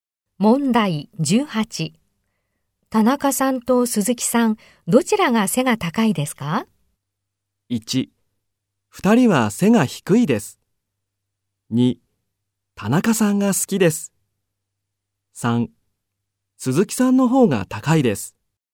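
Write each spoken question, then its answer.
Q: 田中さんと鈴木さん、どちらが背が高いですか?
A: 1: 鈴木さんの方が高いです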